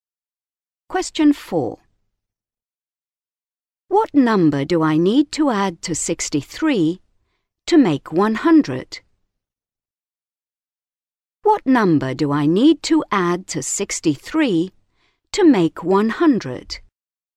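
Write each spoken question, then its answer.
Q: What number do I need to add to 63 to make 100?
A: 37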